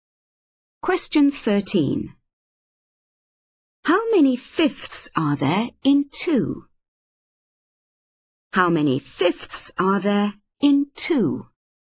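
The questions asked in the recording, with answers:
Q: How many fifths are there in 2?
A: 10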